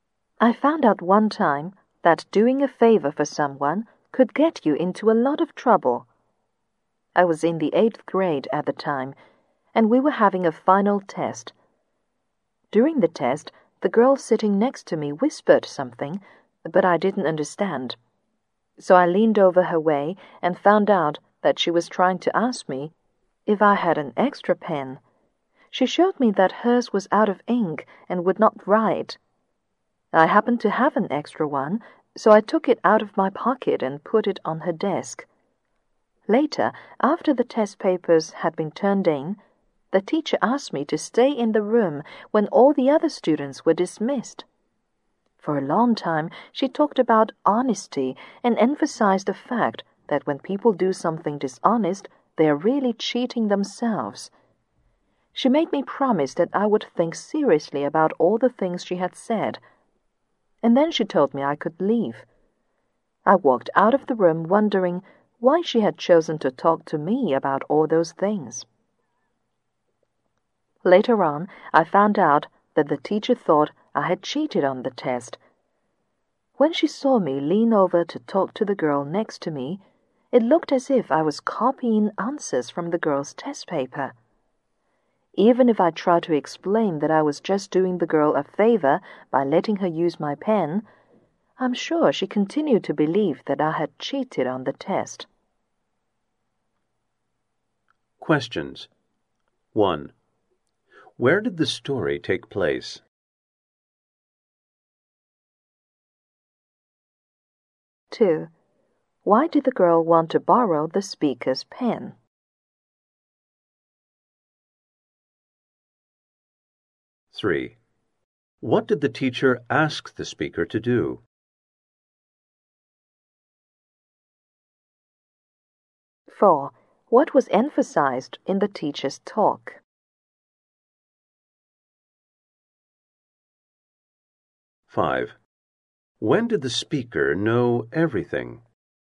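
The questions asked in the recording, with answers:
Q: Where did the story take place?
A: In a classroom during a final test

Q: Why did the girl want to borrow the speaker's pen?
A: Her pen was out of ink

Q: What did the teacher ask the speaker to do?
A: Stay in the room after the other students left

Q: What was emphasized in the teacher's talk?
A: Honesty; dishonest people really cheat themselves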